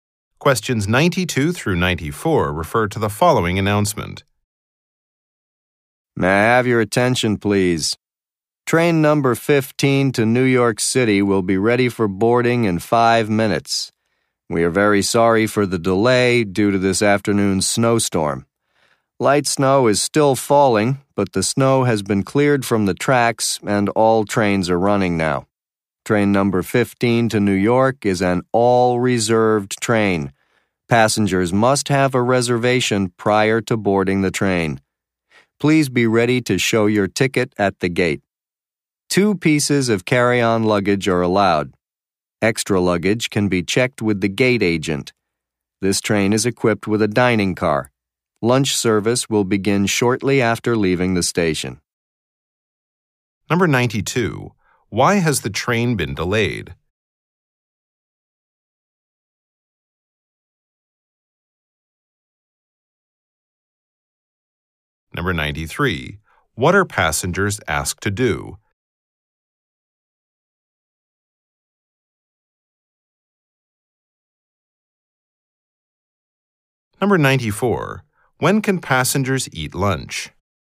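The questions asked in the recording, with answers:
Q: Why has the train been delayed?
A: Because of a snowstorm

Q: What are passengers asked to do?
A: Be ready to show their tickets at the gate

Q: When can passengers eat lunch?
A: Shortly after the train leaves the station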